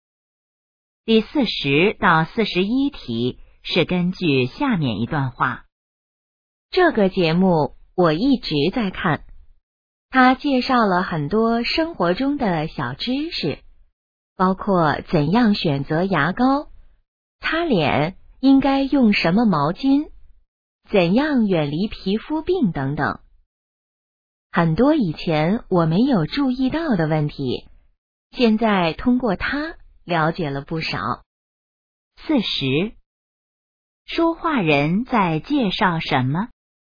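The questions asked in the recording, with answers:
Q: 说话人在介绍什么?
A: 一个介绍生活小知识的节目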